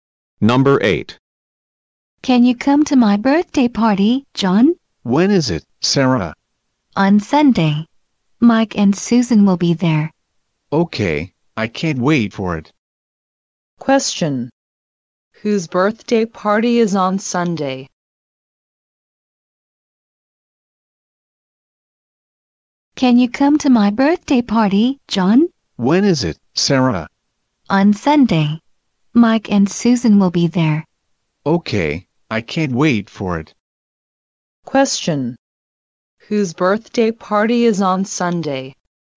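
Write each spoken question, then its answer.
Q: Whose birthday party is on Sunday?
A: Sarah's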